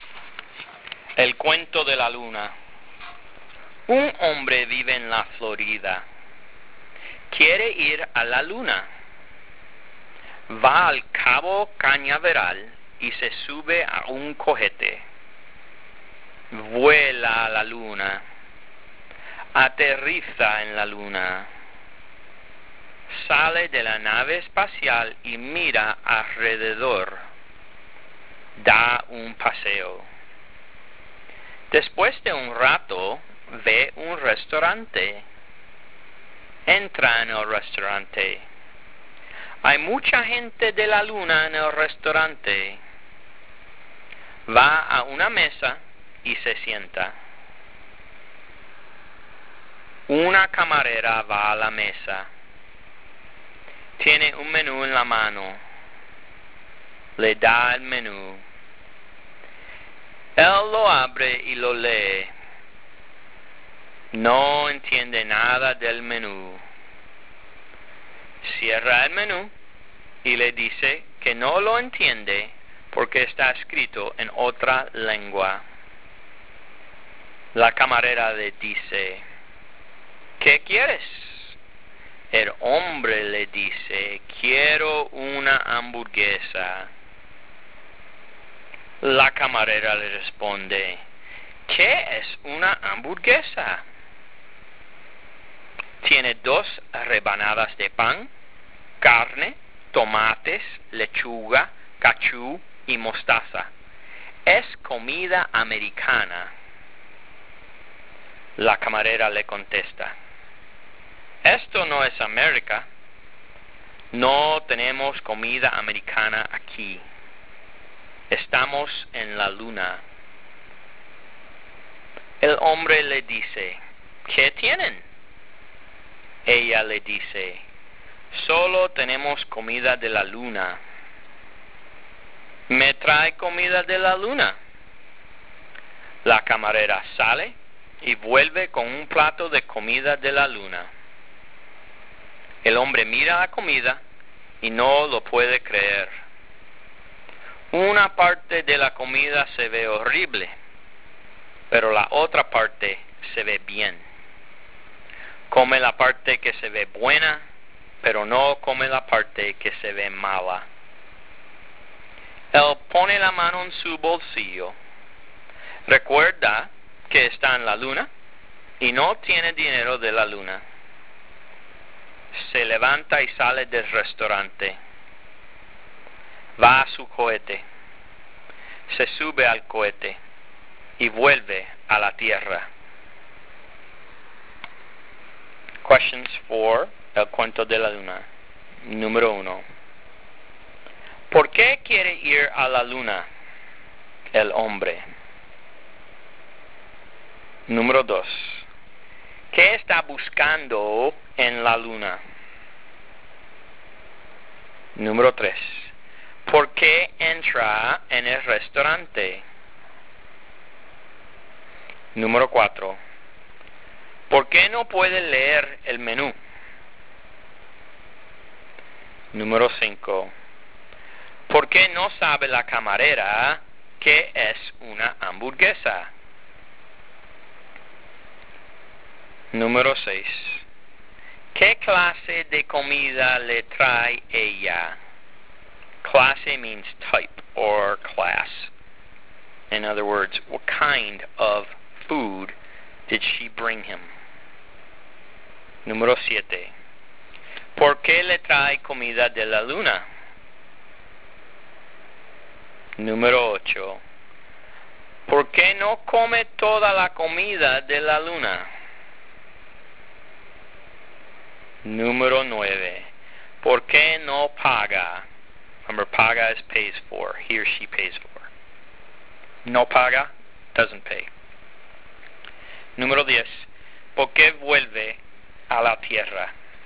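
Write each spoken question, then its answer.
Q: ¿Por qué no puede leer el menú?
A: Porque está escrito en otra lengua

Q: ¿Por qué no sabe la camarera qué es una hamburguesa?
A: Porque es comida americana y están en la luna

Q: ¿Qué clase de comida le trae ella?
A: Comida de la luna

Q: ¿Por qué le trae comida de la luna?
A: Porque solo tienen comida de la luna

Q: ¿Por qué no come toda la comida de la luna?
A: Porque una parte se ve horrible

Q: ¿Por qué no paga?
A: Porque no tiene dinero de la luna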